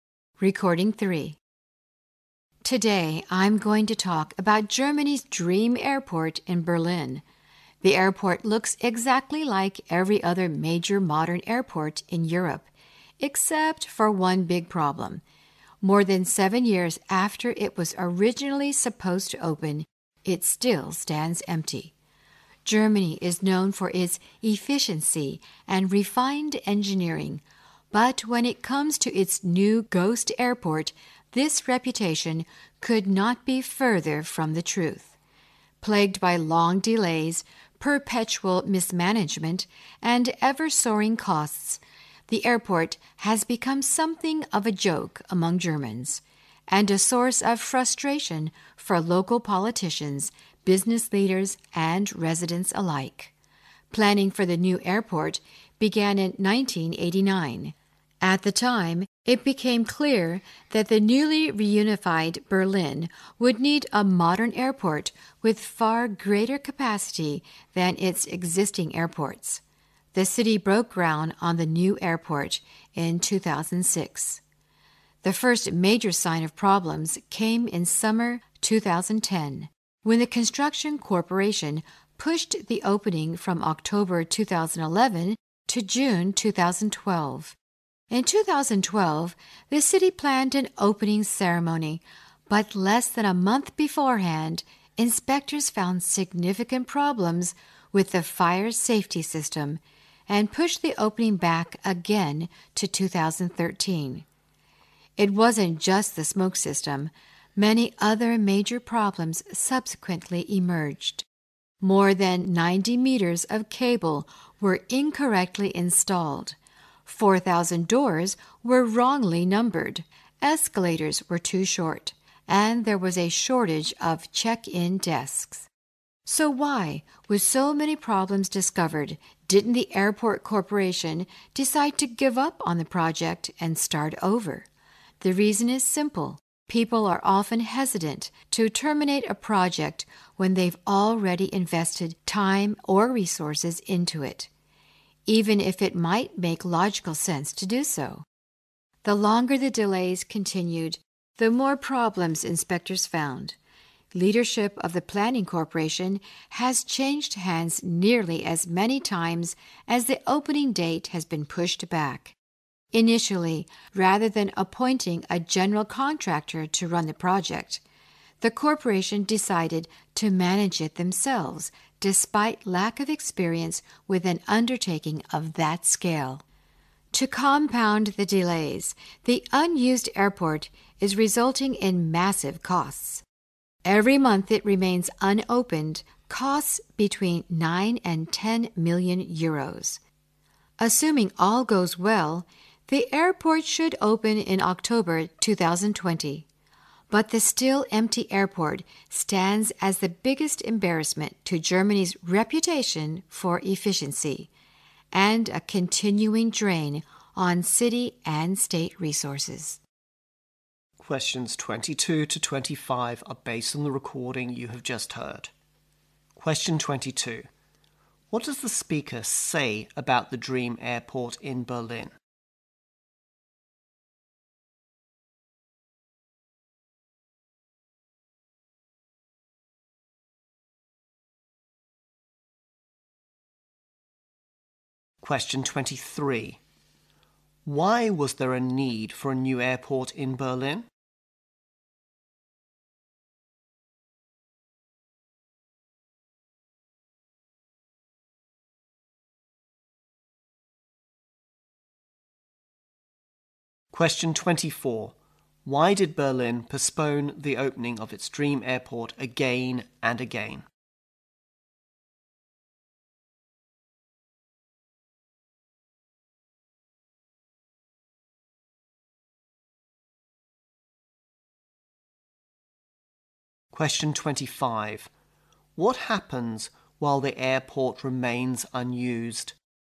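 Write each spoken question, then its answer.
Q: What does the speaker say about the dream airport in Berlin?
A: It still stands empty, more than seven years after it was supposed to open.

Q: Why was there a need for a new airport in Berlin?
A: The newly reunified Berlin needed an airport with far greater capacity.

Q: Why did Berlin postpone the opening of its dream airport again and again?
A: Inspectors kept finding problems, starting with the fire safety system.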